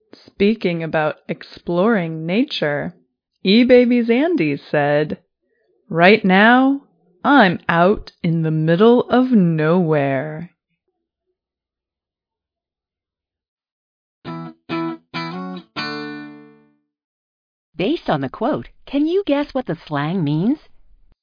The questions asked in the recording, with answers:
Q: Based on the quote, can you guess what the slang means?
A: Middle of nowhere is an expression meaning in the countryside, far from cities or people.